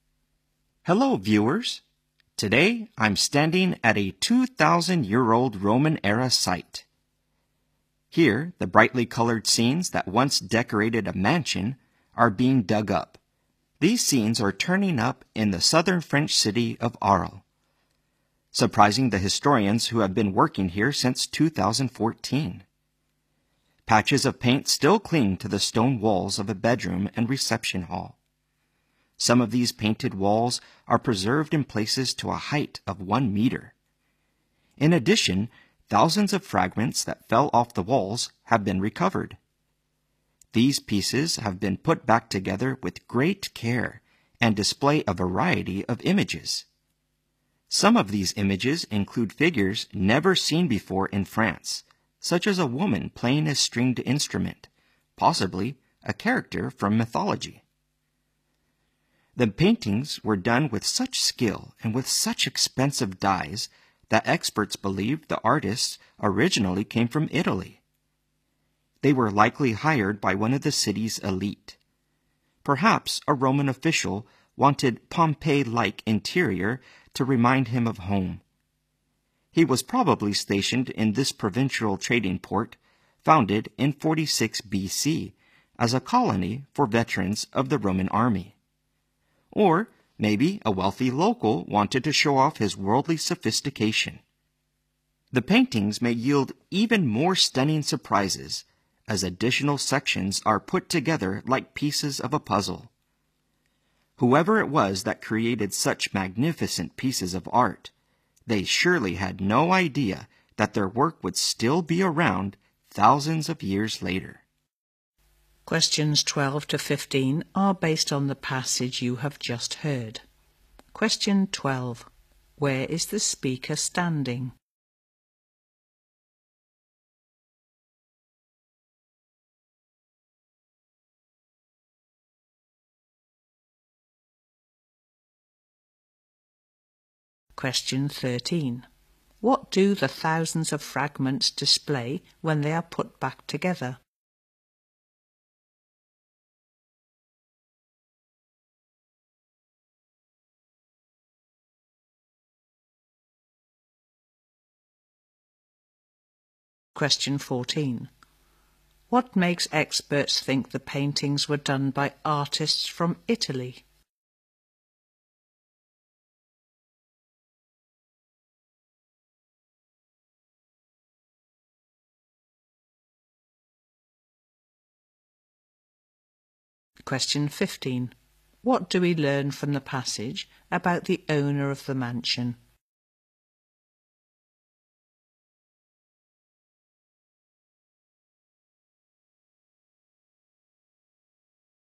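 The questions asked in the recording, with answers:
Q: Where is the speaker standing?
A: At a 2,000-year-old Roman-era site in Arles, France

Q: What do the thousands of fragments display when they are put back together?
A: A variety of images

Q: What makes experts think the paintings were done by artists from Italy?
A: The great skill and expensive dyes used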